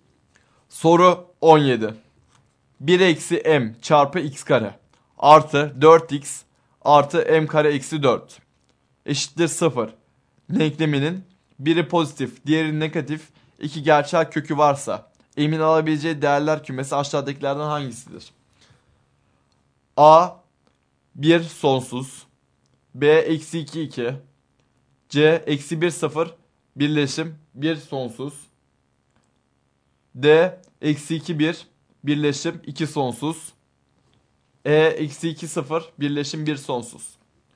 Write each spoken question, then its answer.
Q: Denkleminin biri pozitif, diğeri negatif iki gerçel kökü varsa m'in alabileceği değerler kümesi aşağıdakilerden hangisidir?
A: Doğru yanıt D şıkkı.